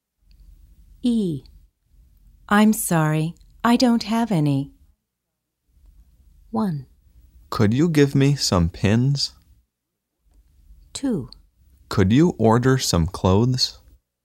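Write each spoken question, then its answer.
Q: I'm sorry, I don't have any.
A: 1: Could you give me some pins?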